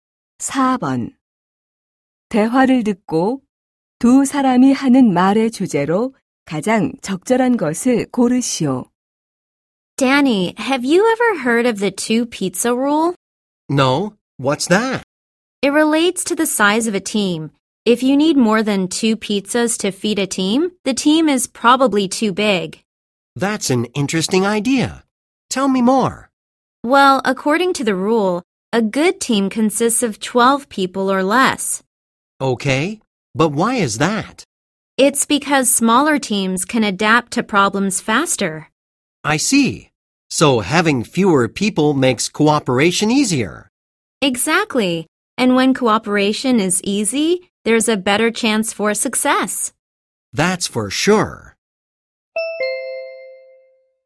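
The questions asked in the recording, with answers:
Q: 대화를 듣고 두 사람이 하는 말의 주제로 가장 적절한 것을 고르시오.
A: 팀 규모가 작을수록 협력과 성공에 유리하다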